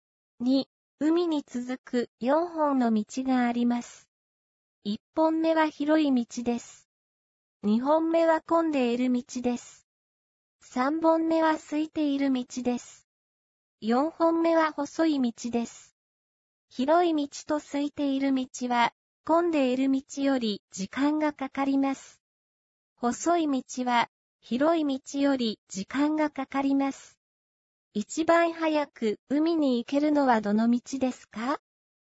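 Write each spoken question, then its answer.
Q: 一番早く海に行けるのはどの道ですか?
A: 二本目の混んでいる道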